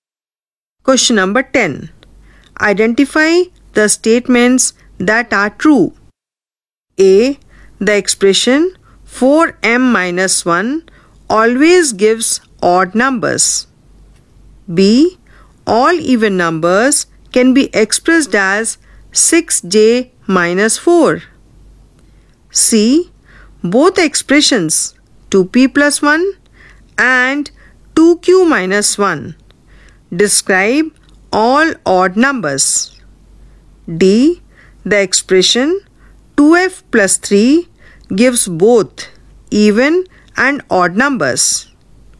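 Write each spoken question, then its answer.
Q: Identify the statements that are true.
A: A and C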